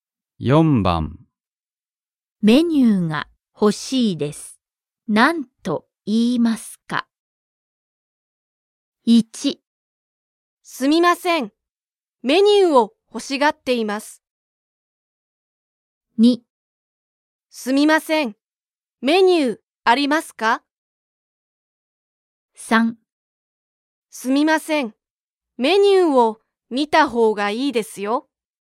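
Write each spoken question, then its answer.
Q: メニューが欲しいです。何と言いますか?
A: 2: すみません。メニューありますか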